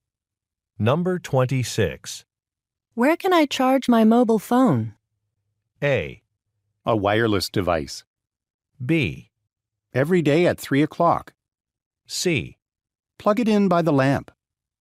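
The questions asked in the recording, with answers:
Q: Where can I charge my mobile phone?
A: C: Plug it in by the lamp.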